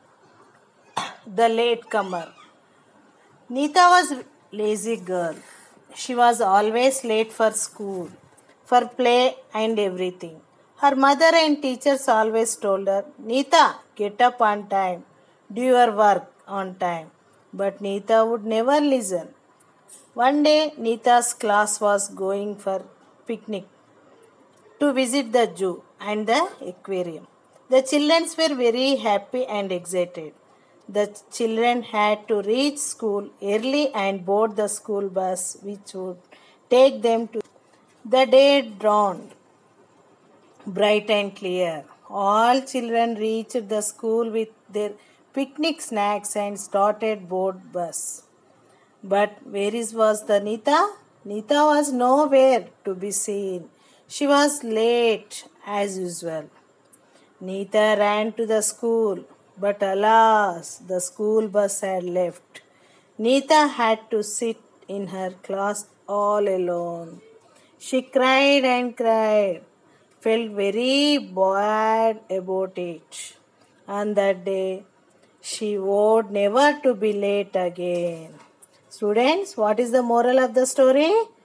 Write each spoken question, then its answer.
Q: Students, what is the moral of the story?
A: Always be on time.